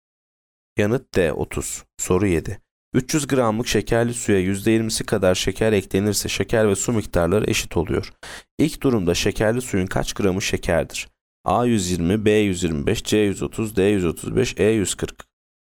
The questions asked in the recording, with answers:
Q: İlk durumda şekerli suyun kaç gramı şekerdir?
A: Yanıt A 120.